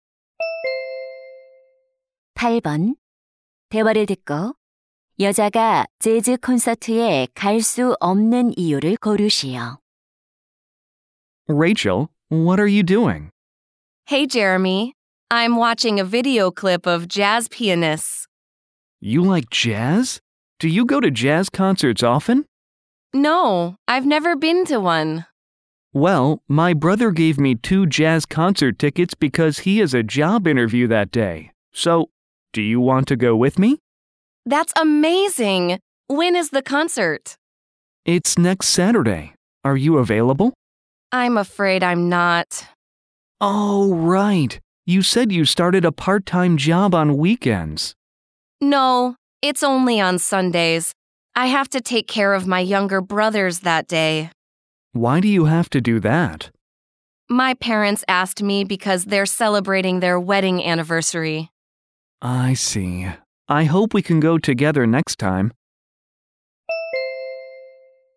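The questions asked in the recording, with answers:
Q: 여자가 재즈 콘서트에 갈 수 없는 이유를 고르시오.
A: 남동생들을 돌봐야 해서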